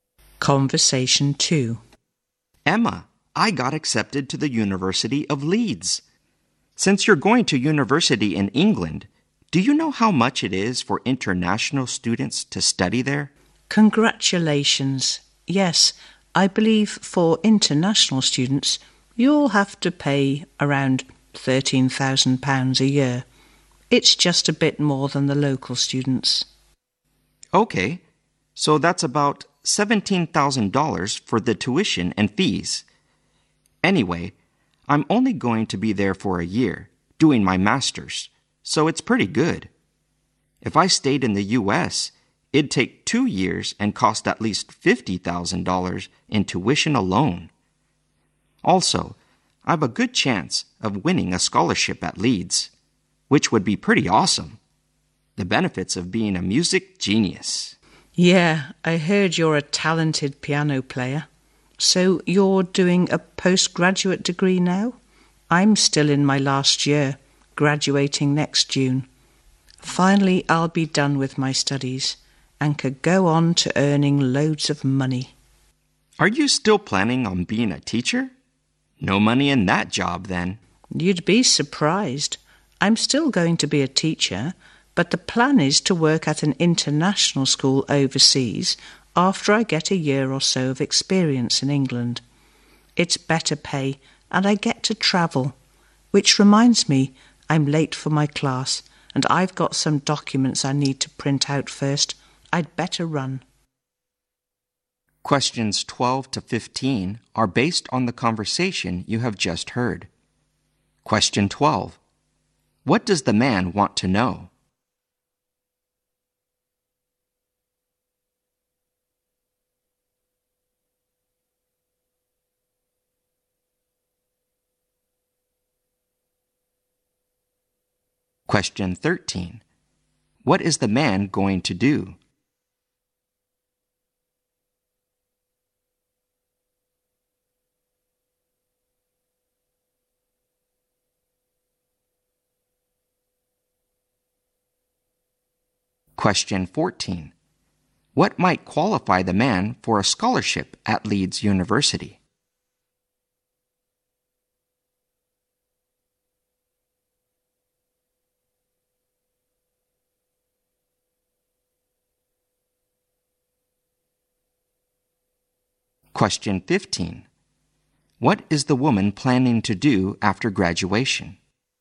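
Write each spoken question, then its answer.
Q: What does the man want to know?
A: How much it costs for international students to study in England.

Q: What is the man going to do?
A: Do a one-year master's degree at the University of Leeds.

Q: What might qualify the man for a scholarship at Leeds University?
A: His musical talent.

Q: What is the woman planning to do after graduation?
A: Be a teacher, gain experience in England, and then teach at an international school overseas.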